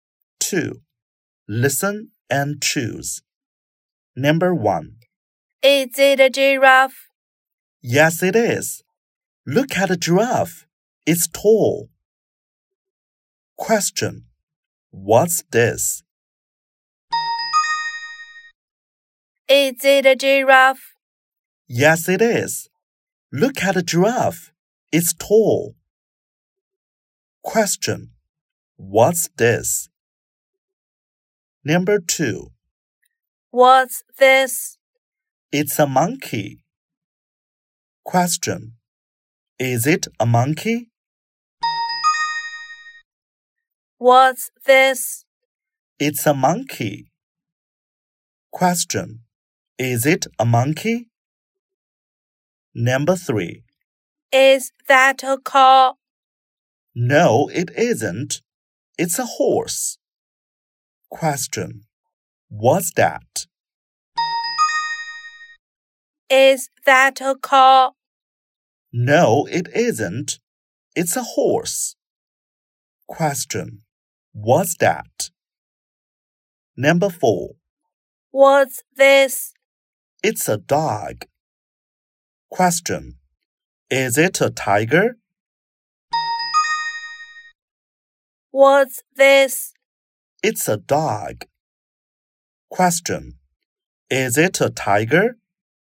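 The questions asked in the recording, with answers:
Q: What's this?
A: It's a giraffe.

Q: Is it a monkey?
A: Yes, it is.

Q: What's that?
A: It's a horse.

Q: Is it a tiger?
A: No, it isn't. It's a dog.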